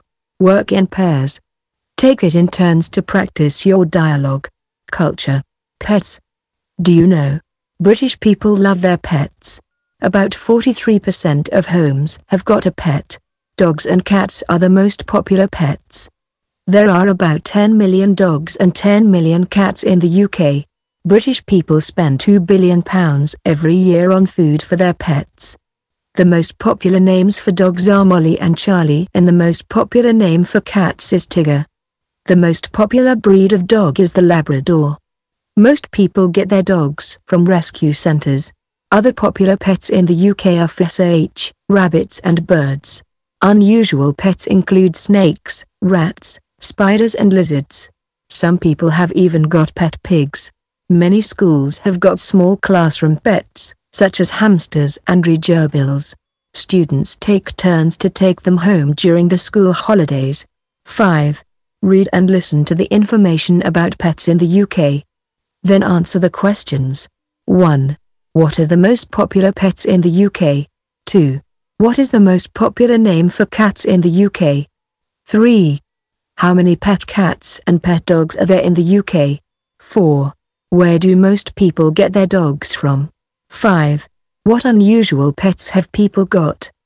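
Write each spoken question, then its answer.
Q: What are the most popular pets in the UK?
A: Dogs and cats

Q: What is the most popular name for cats in the UK?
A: Tigger

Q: How many pet cats and pet dogs are there in the UK?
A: About 10 million dogs and 10 million cats

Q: Where do most people get their dogs from?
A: Rescue centres

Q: What unusual pets have people got?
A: Snakes, rats, spiders, lizards and even pigs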